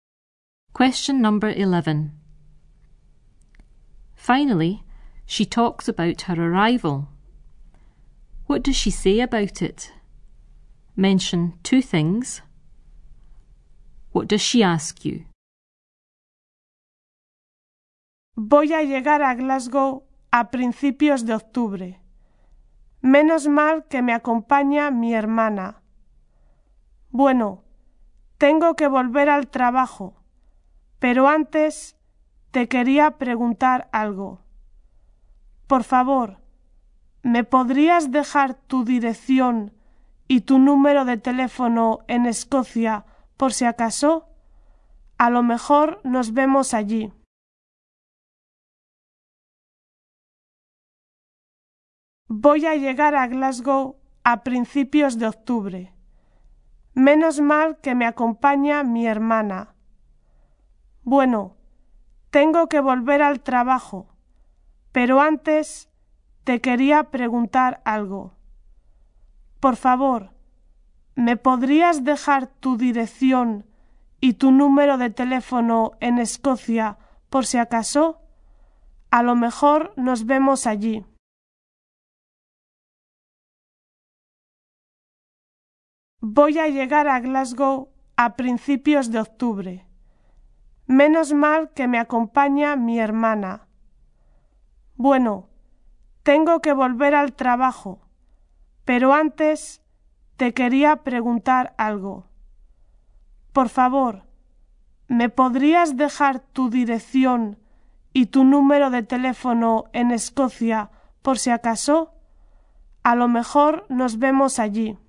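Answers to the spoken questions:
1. Arriving in Glasgow at the beginning of October; her sister is coming with her
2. For your address and phone number in Scotland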